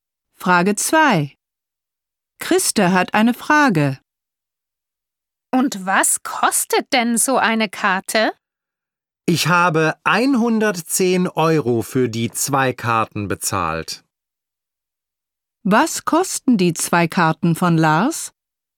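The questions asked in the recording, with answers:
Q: Was kosten die zwei Karten von Lars?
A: 110 Euro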